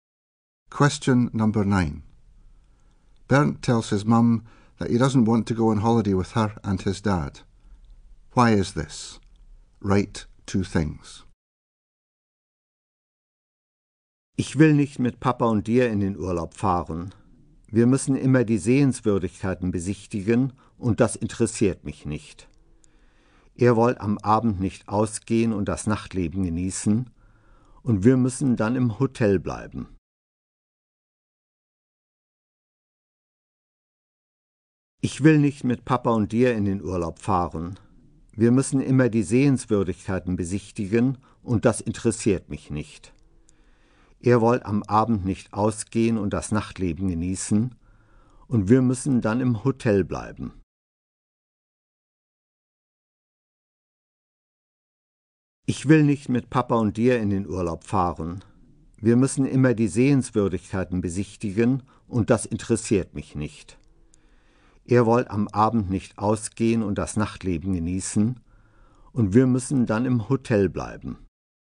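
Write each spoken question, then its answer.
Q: Why is this? Write 2 things.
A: They always visit sights, which don't interest him; they don't want to go out at night, so he has to stay in the hotel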